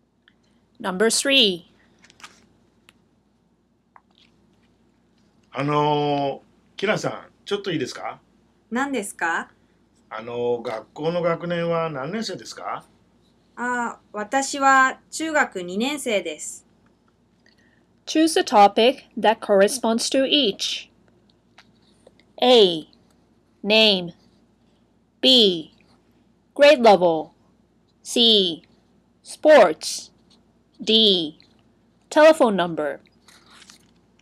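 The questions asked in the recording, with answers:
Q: Choose a topic that corresponds to each.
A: B: Grade level.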